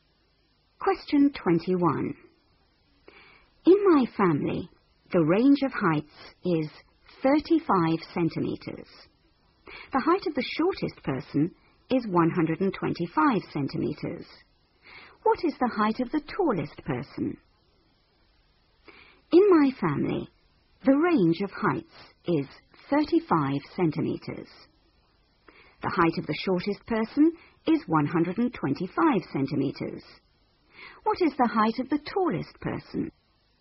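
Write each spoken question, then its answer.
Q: What is the height of the tallest person?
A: 160 centimetres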